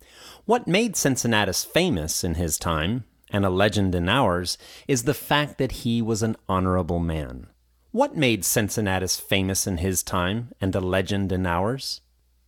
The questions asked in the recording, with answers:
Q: What made Cincinnatus famous in his time, and a legend in ours?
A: The fact that he was an honorable man made him famous in his time, and a legend in ours.